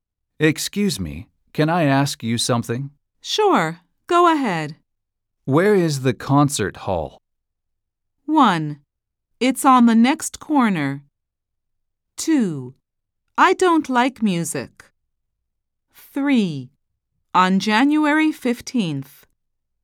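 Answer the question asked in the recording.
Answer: 1: It's on the next corner.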